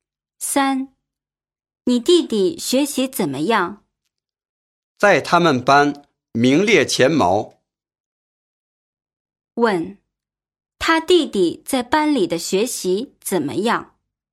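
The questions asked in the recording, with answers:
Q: 他弟弟在班里的学习怎么样?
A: 名列前茅,很好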